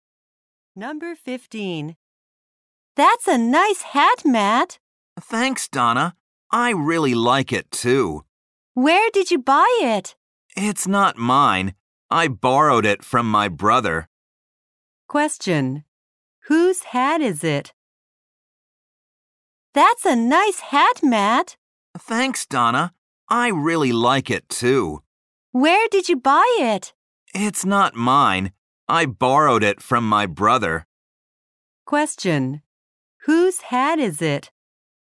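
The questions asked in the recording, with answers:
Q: Whose hat is it?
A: Matt's brother's.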